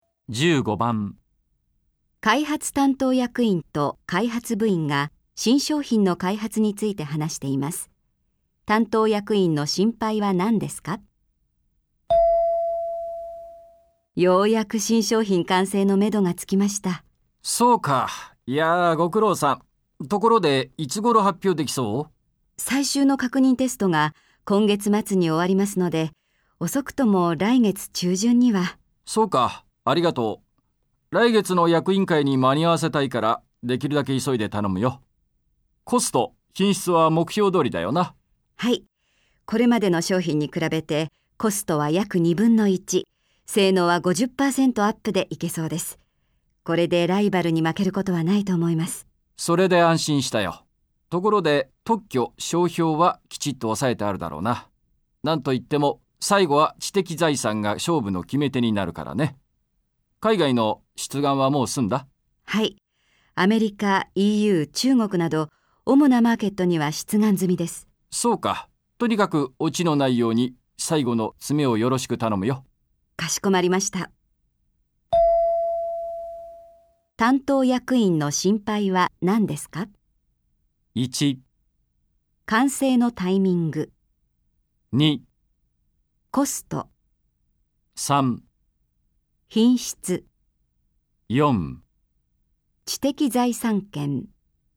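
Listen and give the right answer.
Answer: 4: 知的財産権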